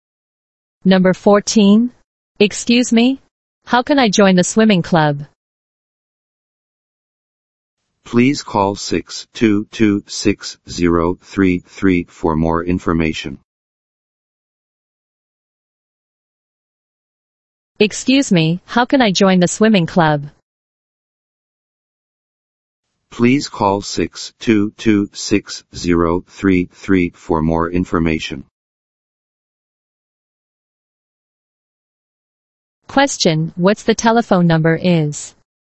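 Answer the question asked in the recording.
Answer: 622-6033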